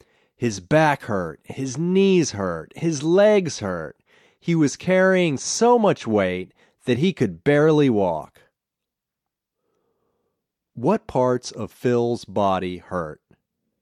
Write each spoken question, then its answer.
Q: What parts of Phil's body hurt?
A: His knees and his legs hurt.